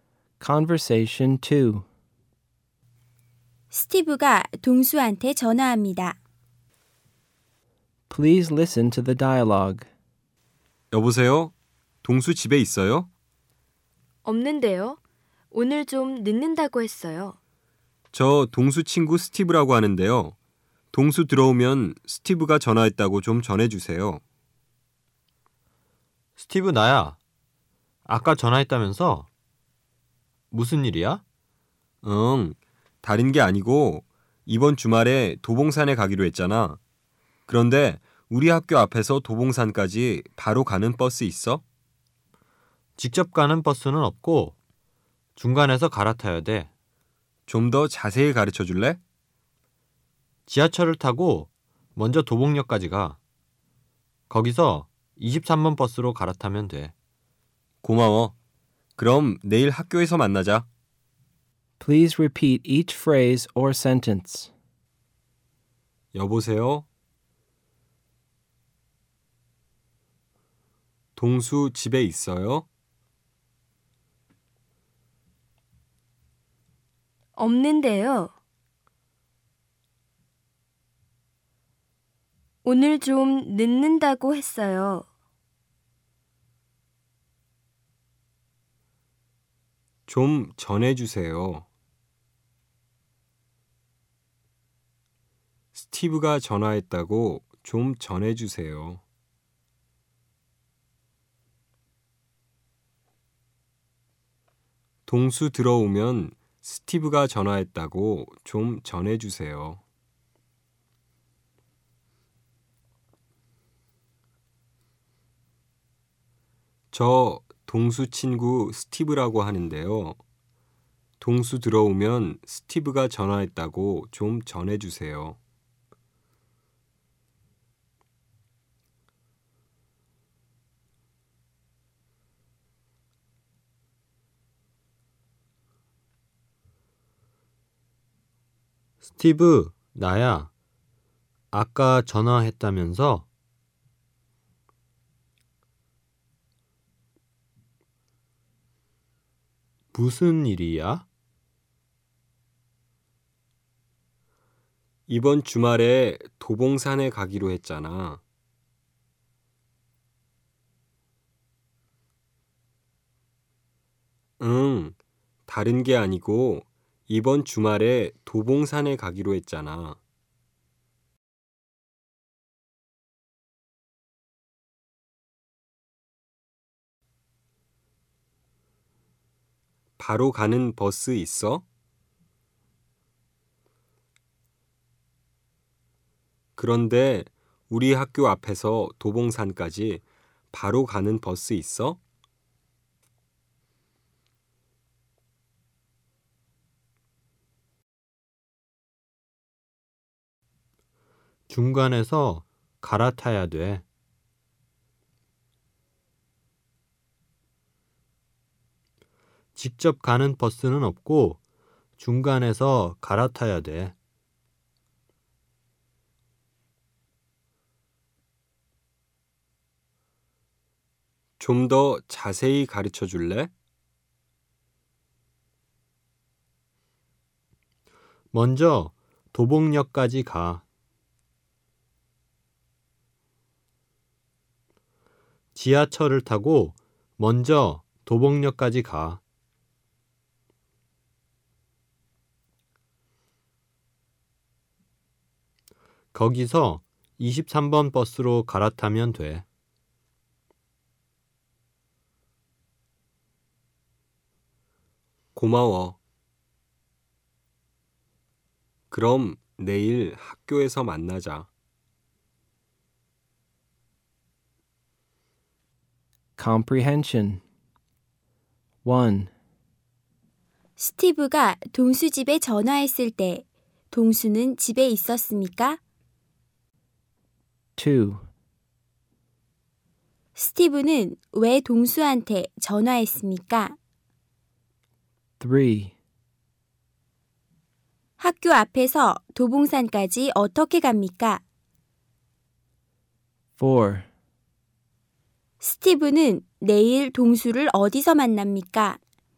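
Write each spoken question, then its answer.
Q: 스티브가 동수 집에 전화했을 때 동수는 집에 있었습니까?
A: 아니요, 없었습니다.

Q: 스티브는 왜 동수한테 전화했습니까?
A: 학교 앞에서 도봉산까지 가는 버스가 있는지 물어보려고

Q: 학교 앞에서 도봉산까지 어떻게 갑니까?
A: 지하철로 도봉역까지 가서 23번 버스로 갈아탑니다.

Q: 스티브는 내일 동수를 어디서 만납니까?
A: 학교에서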